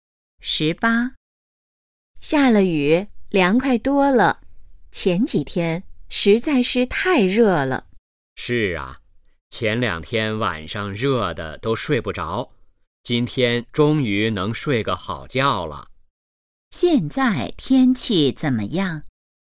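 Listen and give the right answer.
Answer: 凉快多了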